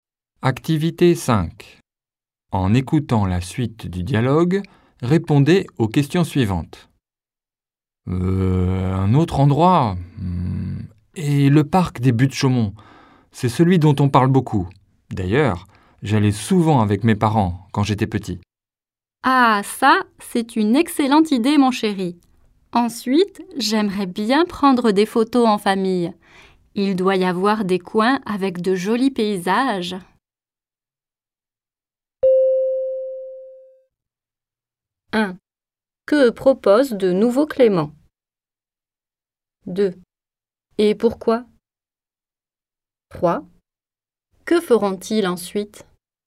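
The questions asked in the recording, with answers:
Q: Que propose de nouveau Clément?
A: Aller au parc des Buttes-Chaumont

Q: Et pourquoi?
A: Il y allait souvent avec ses parents quand il était petit

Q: Que feront-ils ensuite?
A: Prendre des photos en famille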